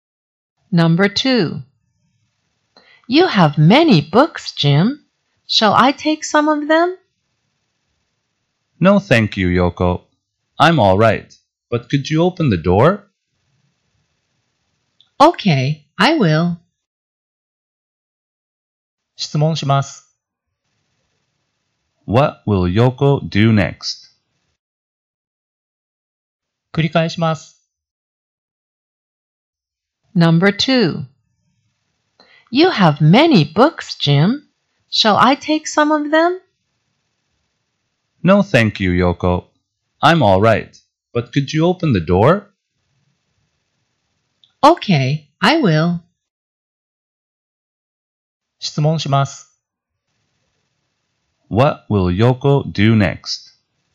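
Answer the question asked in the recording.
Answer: She will open the door.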